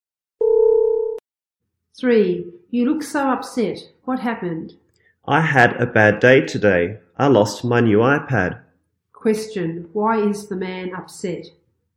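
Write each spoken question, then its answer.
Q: Question, why is the man upset?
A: He lost his new iPad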